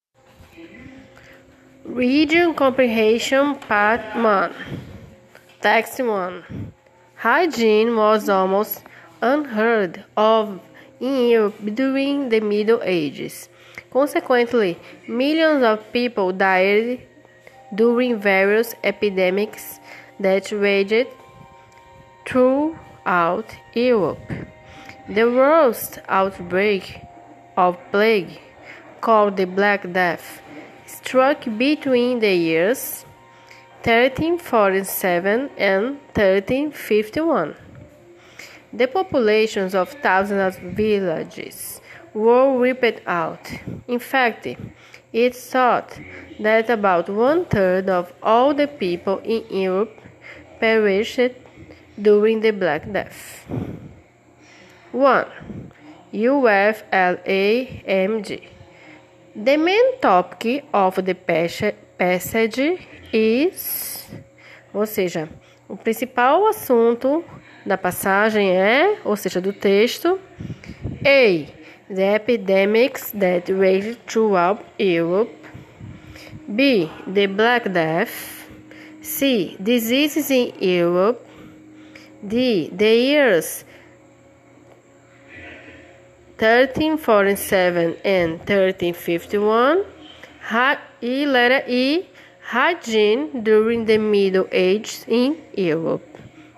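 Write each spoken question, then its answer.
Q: The main topic of the passage is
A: B: the Black Death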